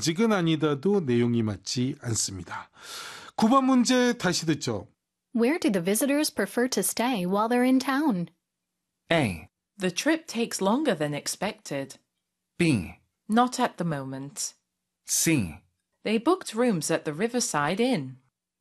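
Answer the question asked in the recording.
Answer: C: They booked rooms at the Riverside Inn.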